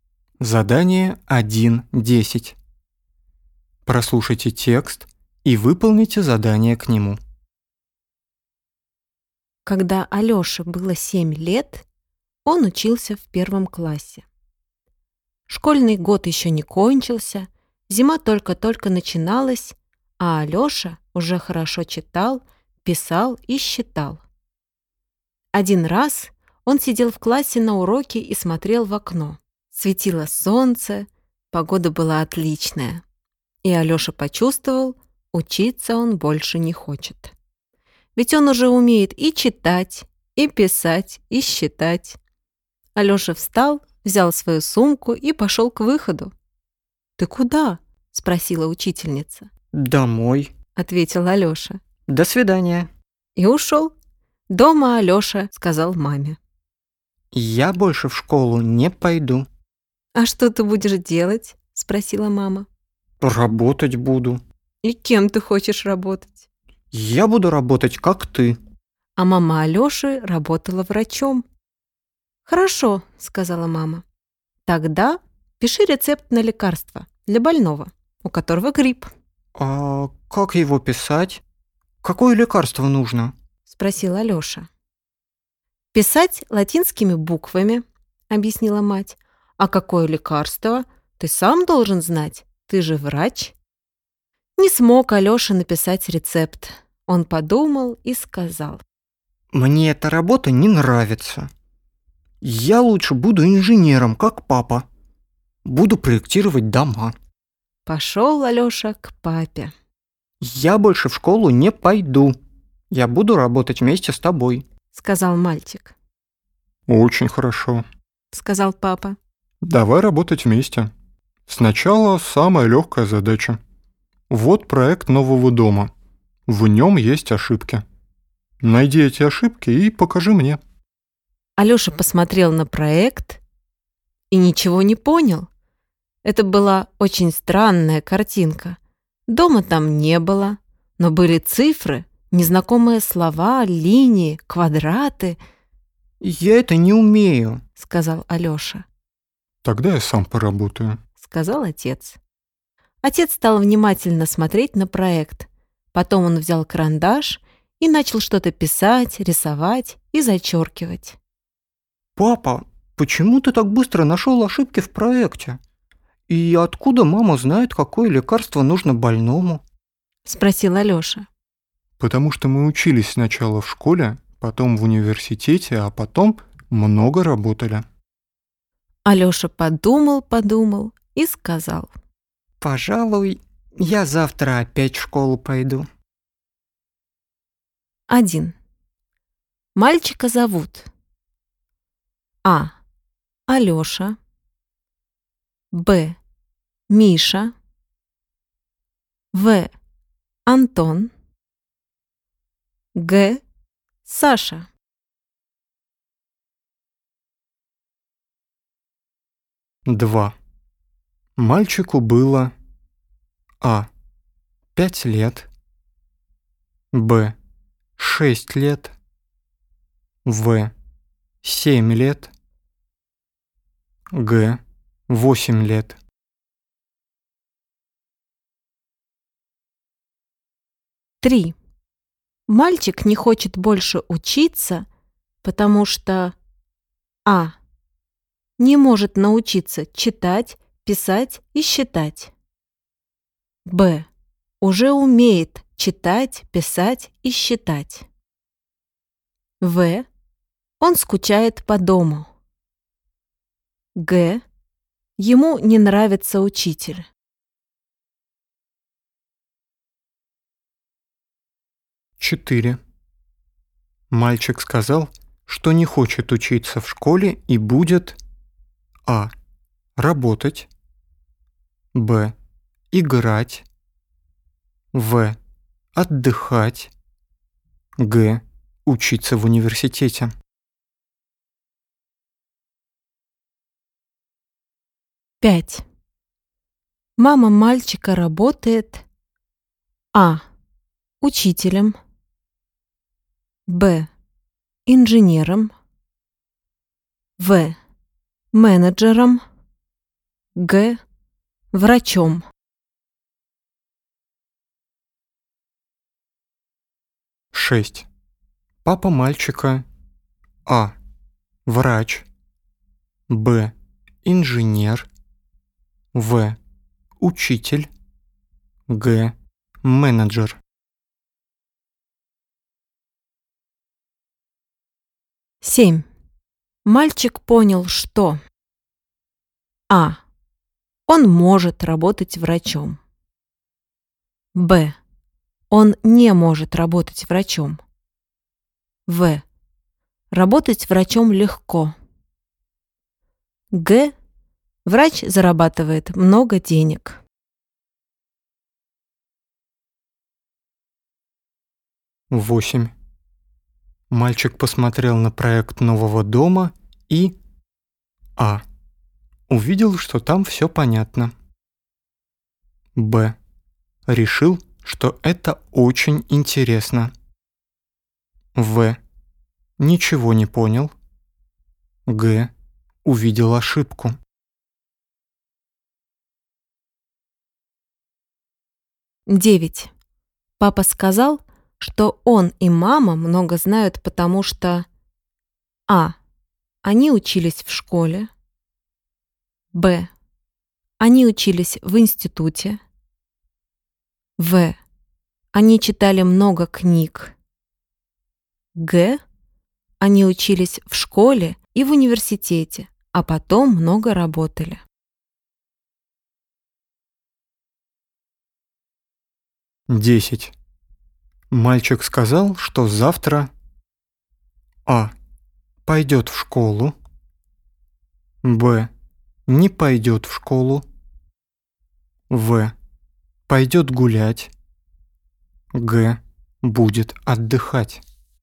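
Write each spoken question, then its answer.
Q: Мальчика зовут.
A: А: Алёша

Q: Мальчику было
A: В: 7 лет

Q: Мальчик не хочет больше учиться, потому что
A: Б: уже умеет читать, писать и считать

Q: Мальчик сказал, что не хочет учиться в школе и будет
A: А: работать

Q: Мама мальчика работает,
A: Г: Врачом

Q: Папа мальчика.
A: Б: Инженер

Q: Мальчик понял, что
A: Б: Он не может работать врачом

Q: Мальчик посмотрел на проект нового дома и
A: В: Ничего не понял

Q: Папа сказал, что он и мама много знают, потому что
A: Г: Они учились в школе и в университете, а потом много работали

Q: Мальчик сказал, что завтра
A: А: Пойдет в школу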